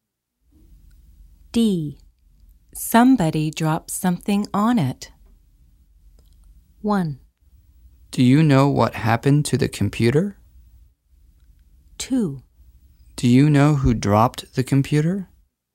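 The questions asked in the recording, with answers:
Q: Somebody dropped something on it.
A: 1: Do you know what happened to the computer?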